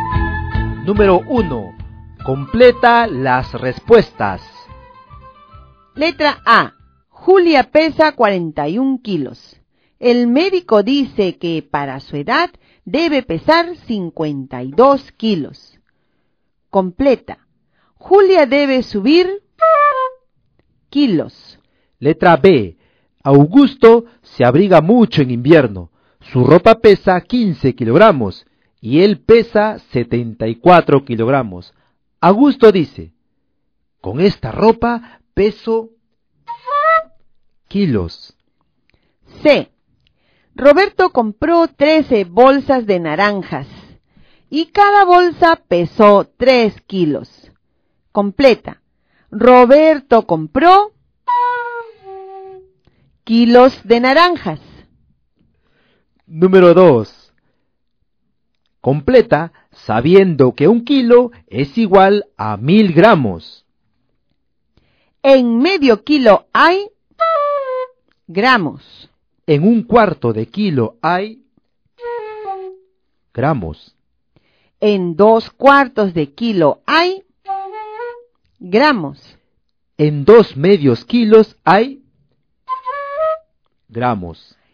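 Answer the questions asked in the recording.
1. 11 kilos
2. 89 kilos
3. 39 kilos
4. 500 gramos
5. 250 gramos
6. 500 gramos
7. 1000 gramos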